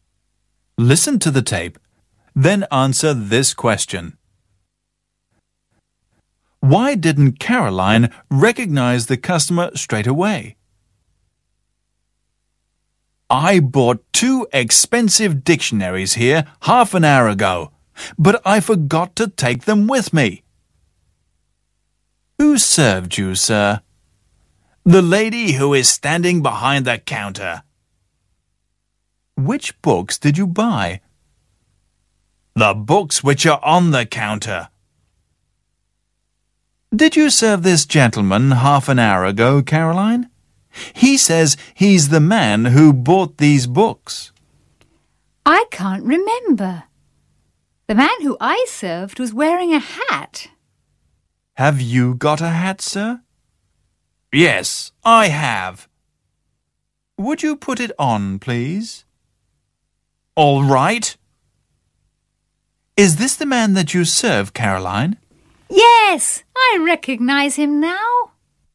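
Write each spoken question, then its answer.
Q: Why didn't Caroline recognize the customer straight away?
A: Because he wasn't wearing his hat; the man she served had been wearing one.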